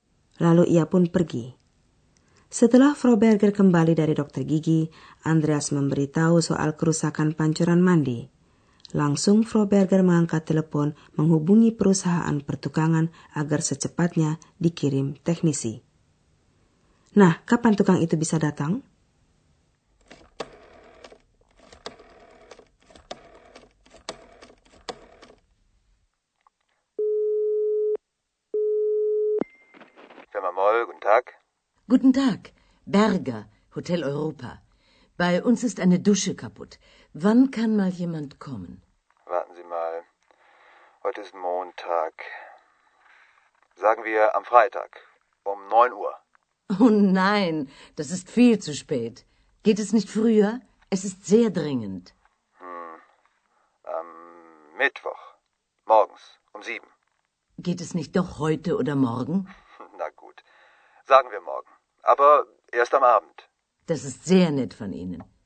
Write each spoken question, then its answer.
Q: Nah, kapan tukang itu bisa datang?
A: Sebagai hasil perundingan, akhirnya perusahaan itu mengatakan sanggup mengirim tukang besok malam.